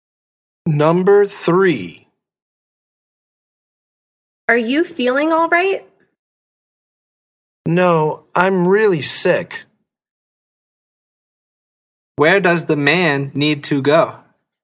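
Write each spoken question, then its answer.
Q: Where does the man need to go?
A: the doctor / hospital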